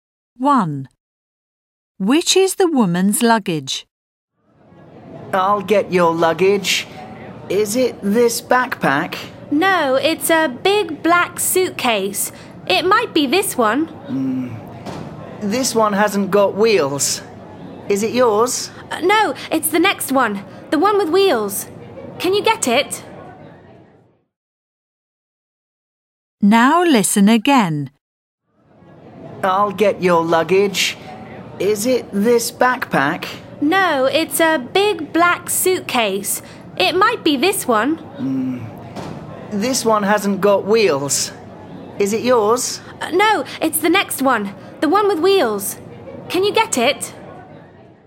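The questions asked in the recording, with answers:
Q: Which is the woman's luggage?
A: The big black suitcase with wheels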